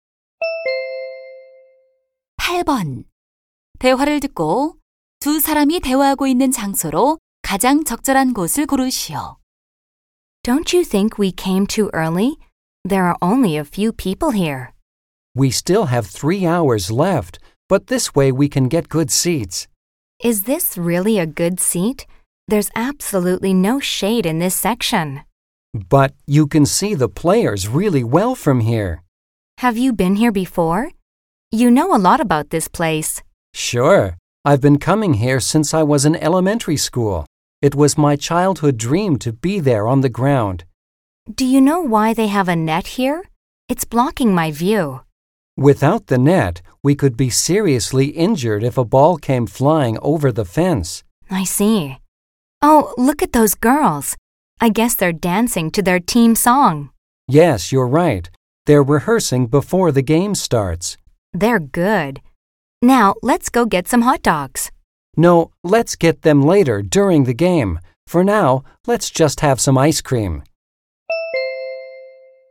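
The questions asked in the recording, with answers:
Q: 두 사람이 대화하고 있는 장소로 가장 적절한 곳을 고르시오.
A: 야구장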